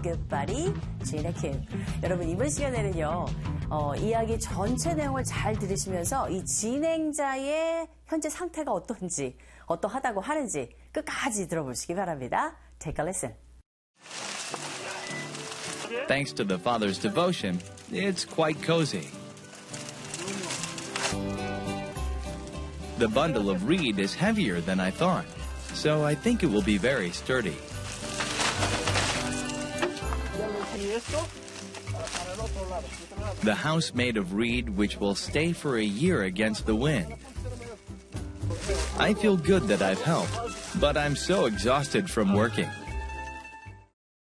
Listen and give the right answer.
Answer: 일을 해서 너무 지친 상태가 되겠네요.